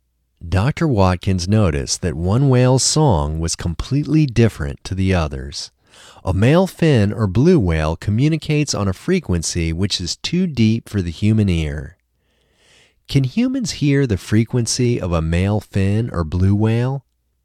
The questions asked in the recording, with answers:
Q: Can humans hear the frequency of a male fin or blue whale?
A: No, humans can't hear the frequency of a male fin or blue whale.